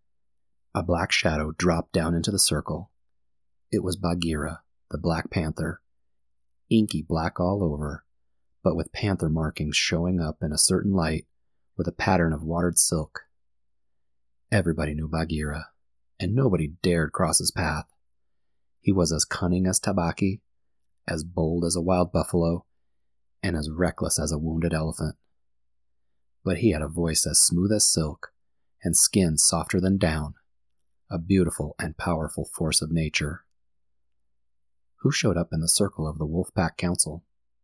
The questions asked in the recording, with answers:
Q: Who showed up in the circle of the wolf pack council?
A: Bagheera, the black panther, dropped into the circle like a shadow.